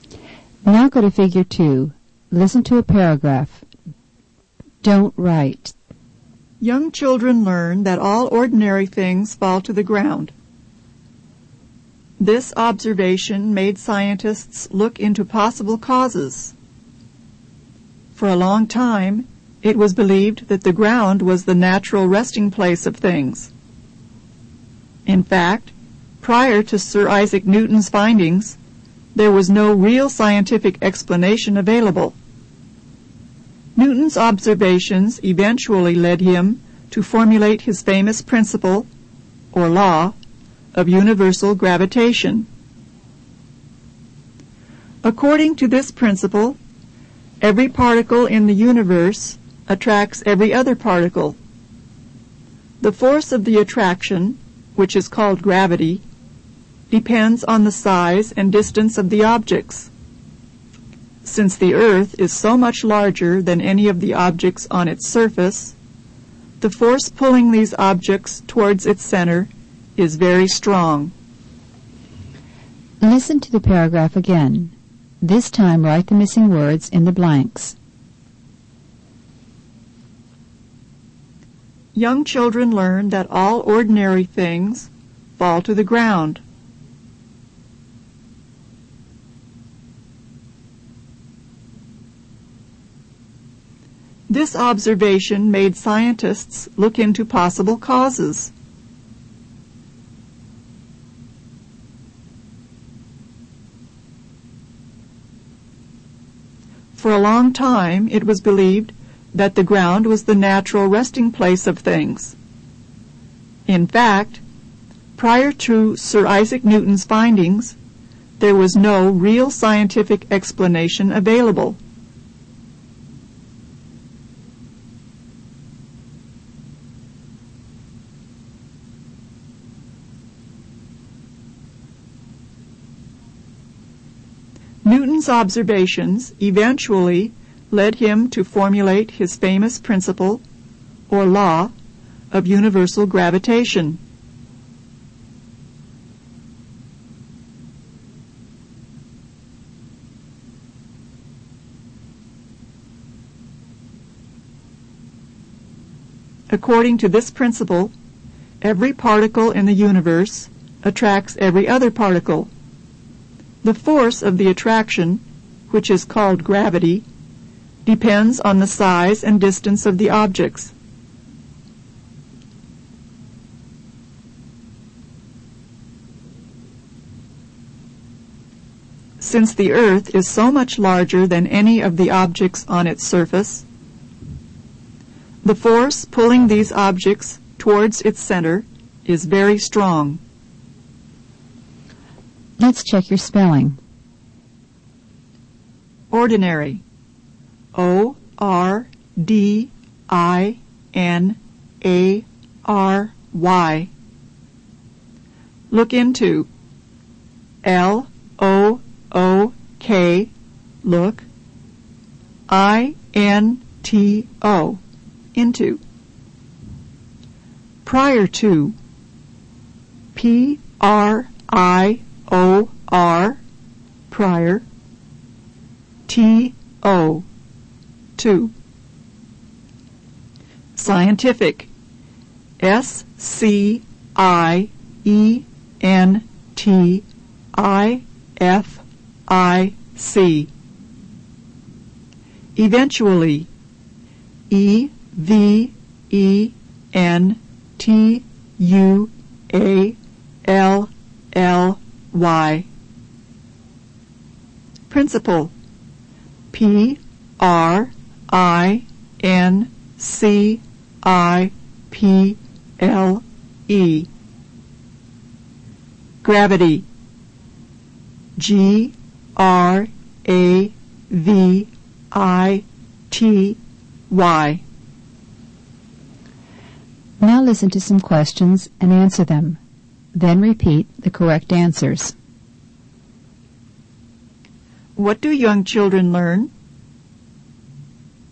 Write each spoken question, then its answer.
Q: What do young children learn?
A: All young children learn that all ordinary things fall to the ground.